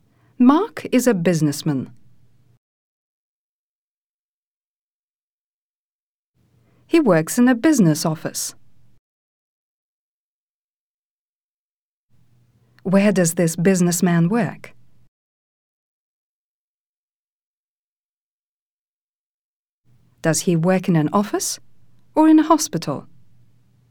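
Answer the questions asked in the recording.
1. In a business office
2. In an office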